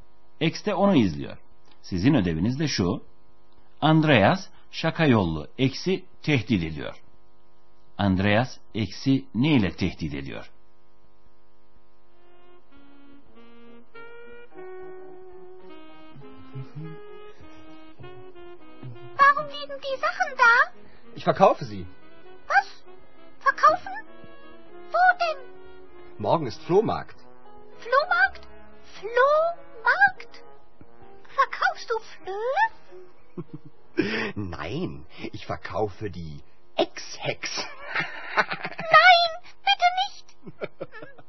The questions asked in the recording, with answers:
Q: Andreas eksi ne ile tehdit ediyor?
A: Eskileriyle birlikte cadaloz eksi de satacağını söyledi.